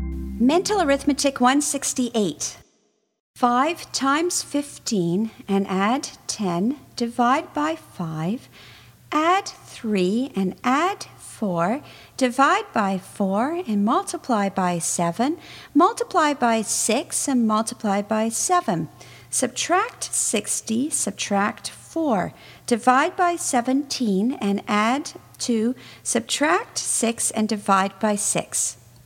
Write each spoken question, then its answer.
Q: 5 times 15 and add 10, divide by 5, add 3 and add 4, divide by 4 and multiply by 7, multiply by 6 and multiply by 7, subtract 60, subtract 4, divide by 17 and add 2, subtract 6 and divide by 6.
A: And the answer is 16.